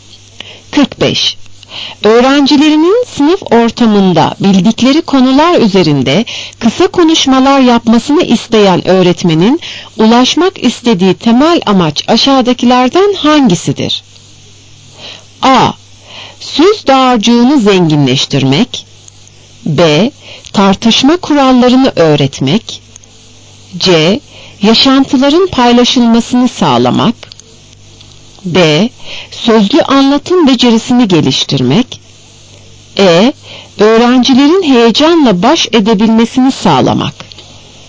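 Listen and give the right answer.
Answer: D: Sözlü anlatım becerisini geliştirmek.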